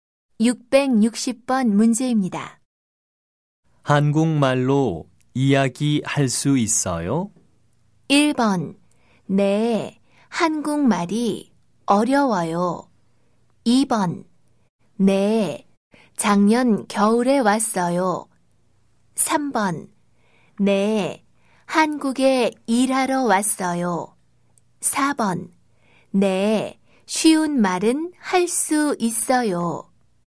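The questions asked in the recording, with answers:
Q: 한국말로 이야기할 수 있어요?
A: 4: 네, 쉬운 말은 할 수 있어요.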